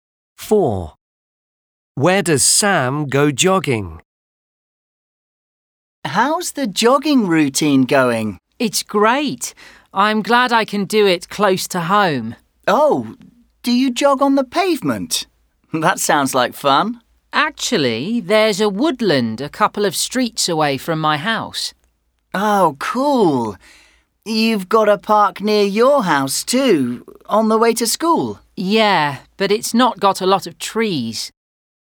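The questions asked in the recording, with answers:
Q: Where does Sam go jogging?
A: In a woodland near his house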